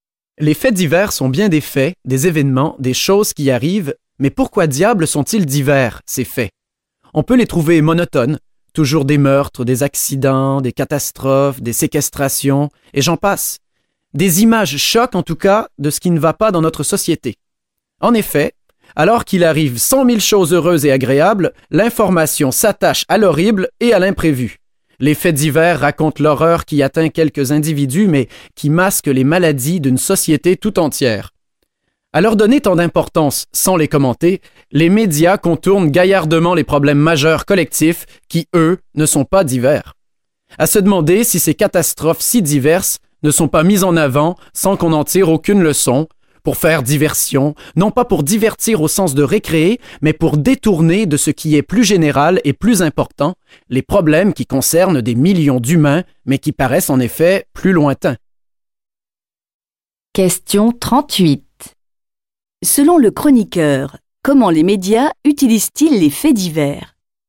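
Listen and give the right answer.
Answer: Pour faire diversion : détourner l'attention des problèmes collectifs majeurs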